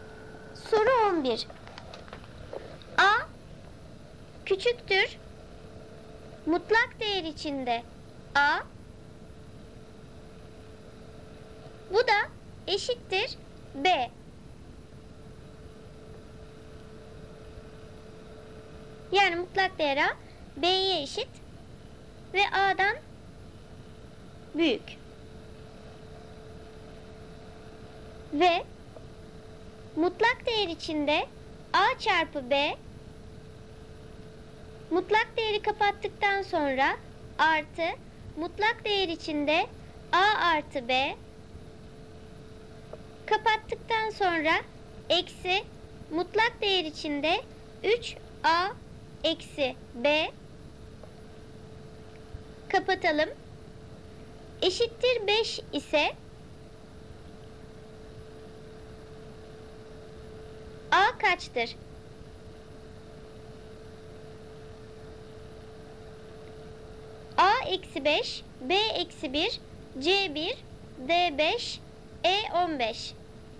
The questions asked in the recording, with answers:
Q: a kaçtır?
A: Doğru cevap A eksi 5.